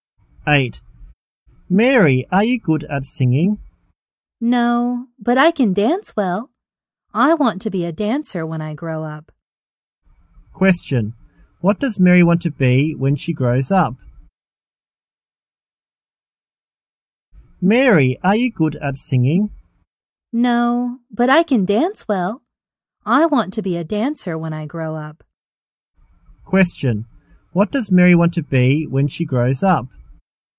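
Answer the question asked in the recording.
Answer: A dancer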